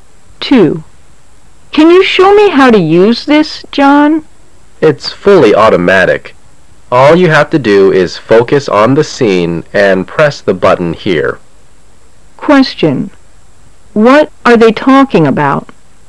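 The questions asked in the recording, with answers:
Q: What are they talking about?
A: How to use an automatic camera

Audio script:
[解析] W: Can you show me how to use this, John? M: It's fully automatic. All you have to do is focus on the scene and press the button here. Q: What are they talking about ?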